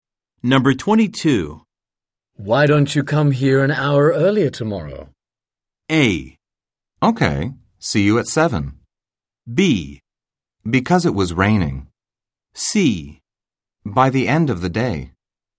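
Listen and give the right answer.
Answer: A: Okay. See you at 7.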